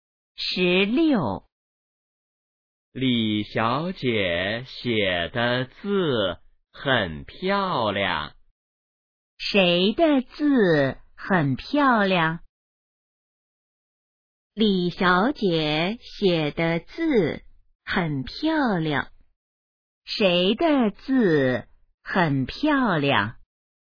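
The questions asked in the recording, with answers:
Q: 谁的字很漂亮?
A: 李小姐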